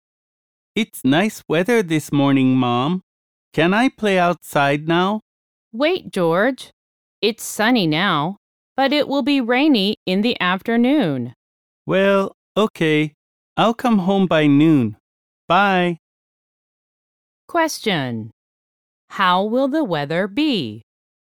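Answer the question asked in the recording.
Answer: Sunny in the morning, but rainy in the afternoon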